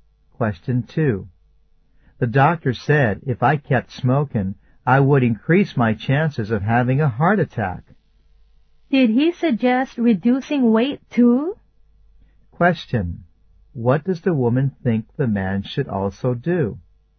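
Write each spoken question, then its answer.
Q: What does the woman think the man should also do?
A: Lose weight.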